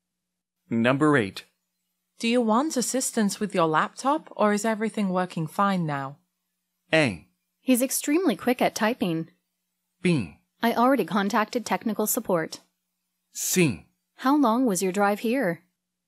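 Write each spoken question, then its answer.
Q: Do you want assistance with your laptop, or is everything working fine now?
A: B: I already contacted technical support.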